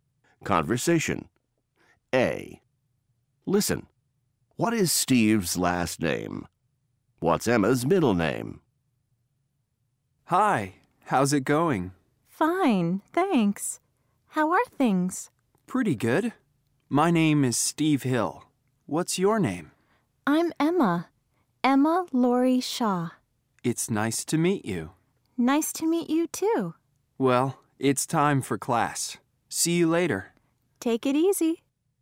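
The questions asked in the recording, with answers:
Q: What is Steve's last name?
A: Hill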